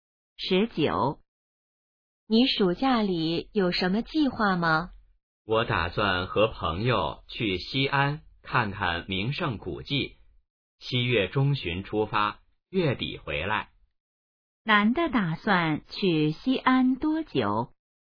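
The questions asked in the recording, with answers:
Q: 男的打算去西安多久?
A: 半个月左右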